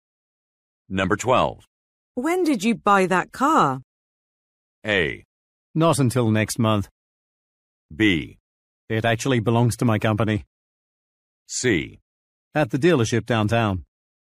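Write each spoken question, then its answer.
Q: When did you buy that car?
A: B: It actually belongs to my company.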